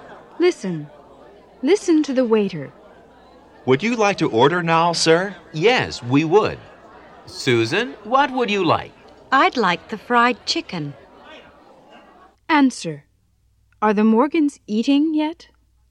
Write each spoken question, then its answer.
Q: Are the Morgans eating yet?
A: No, they're not.